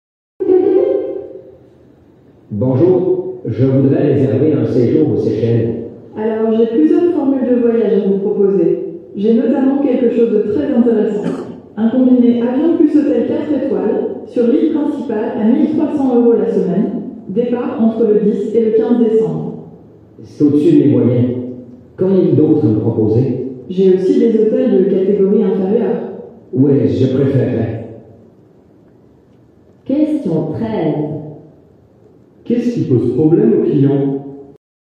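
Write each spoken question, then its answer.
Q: Qu'est-ce qui pose problème aux clients ?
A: Le prix, trop élevé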